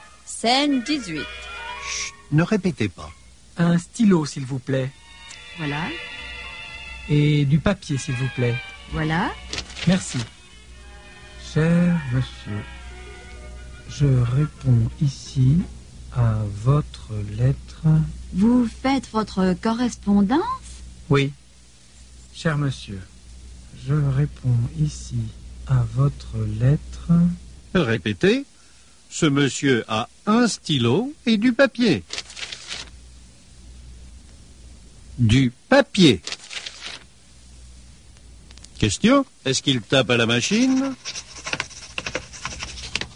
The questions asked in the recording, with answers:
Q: Question, est-ce qu'il tape à la machine ?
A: Non, il ne tape pas à la machine.